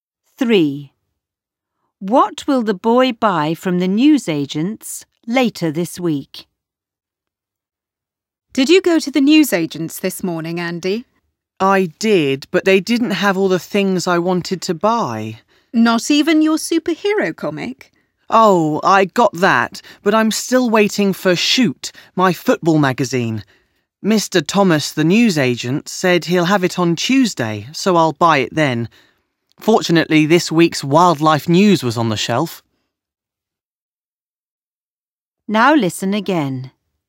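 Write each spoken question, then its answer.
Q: What will the boy buy from the newsagents later this week?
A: His football magazine (Shoot)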